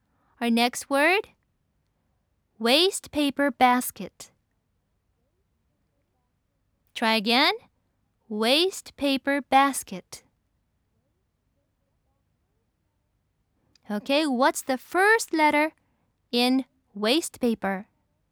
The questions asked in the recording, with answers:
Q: Okay, what's the first letter in waste paper?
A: Yes, it's W.